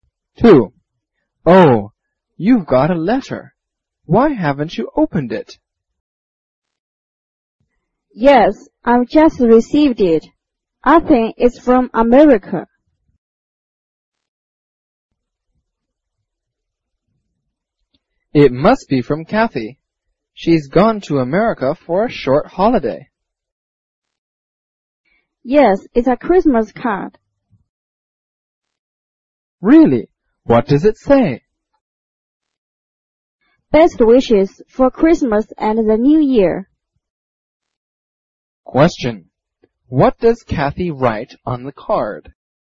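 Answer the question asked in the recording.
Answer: Best wishes for Christmas and the New Year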